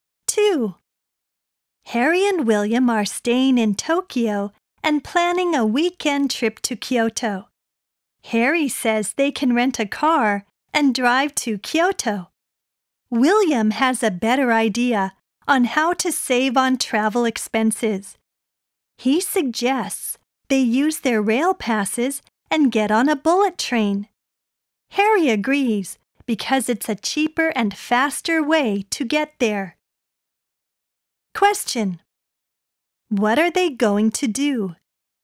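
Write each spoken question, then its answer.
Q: What are they going to do?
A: Take a bullet train to Kyoto using their rail passes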